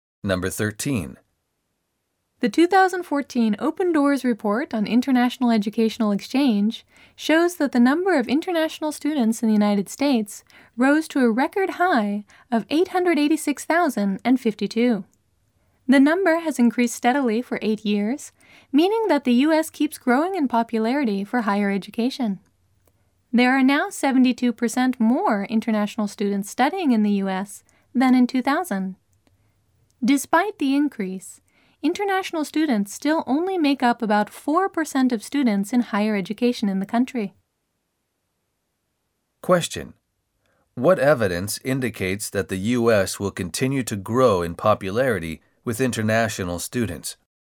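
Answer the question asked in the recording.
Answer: The number of international students has increased steadily for 8 years, reaching a record high of 886,052.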